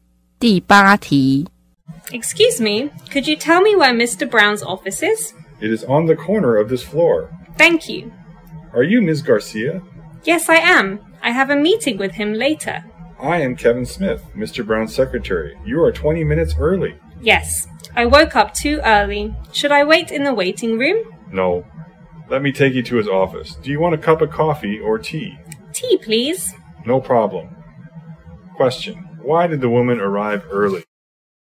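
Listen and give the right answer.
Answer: She woke up too early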